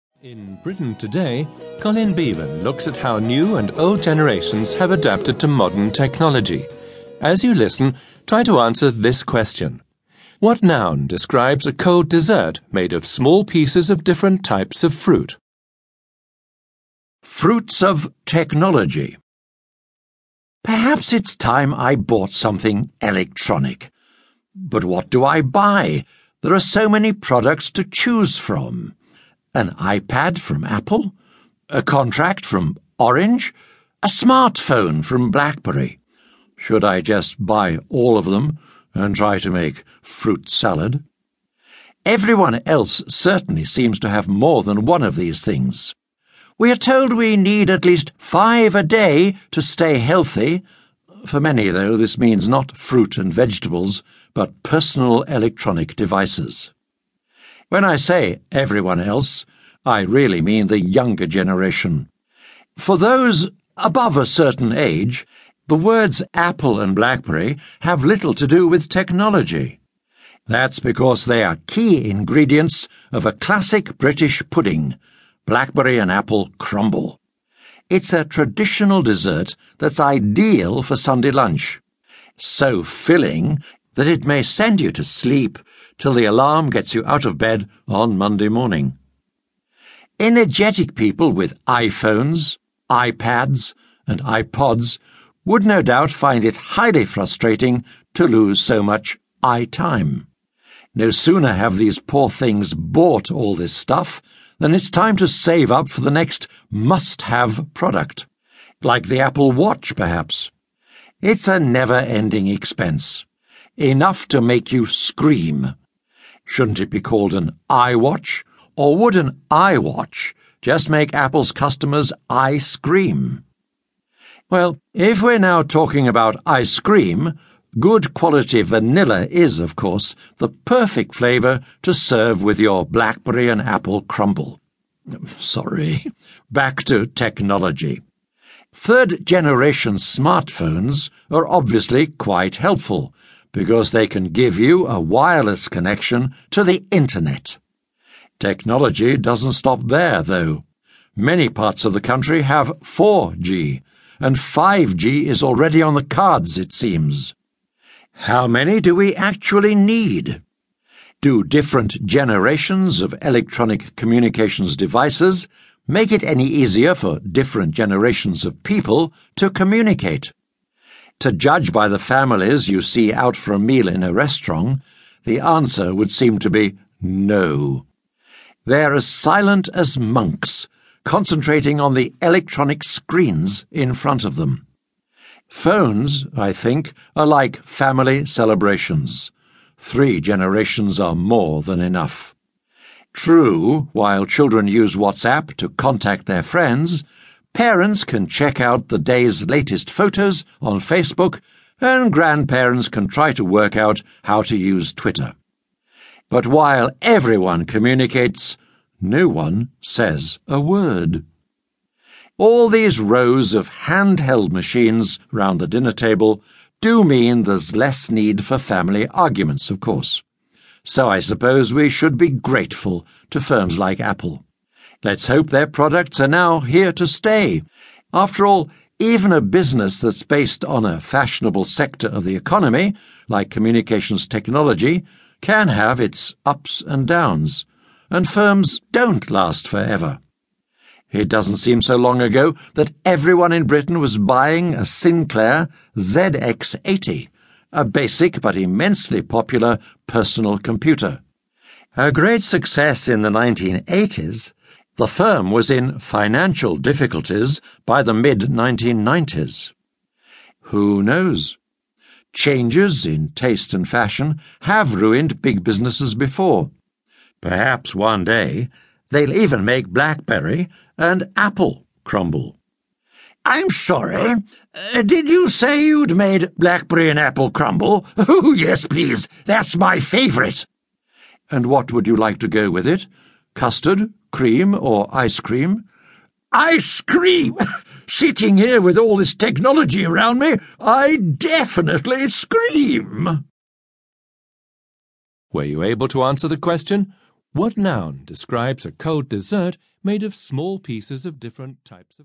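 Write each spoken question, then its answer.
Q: What noun describes a cold dessert made of small pieces of different types of fruit?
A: fruit salad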